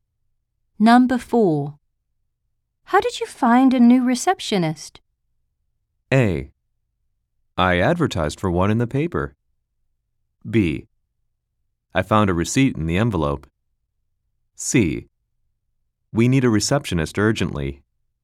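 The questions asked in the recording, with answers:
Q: How did you find a new receptionist?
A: A: I advertised for one in the paper.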